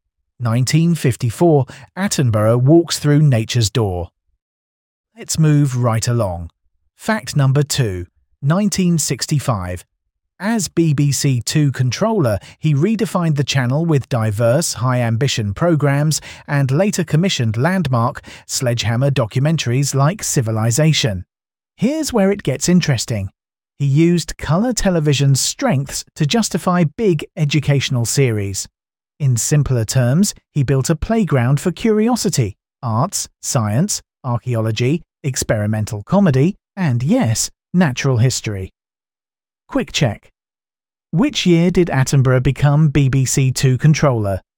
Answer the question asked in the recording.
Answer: correct answer, 1965.